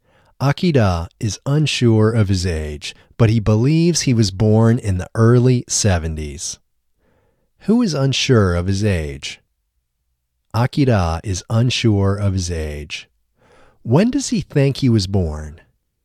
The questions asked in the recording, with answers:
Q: Who is unsure of his age?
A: Akira is unsure of his age.

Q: When does he think he was born?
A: He thinks he was born in the early 70s.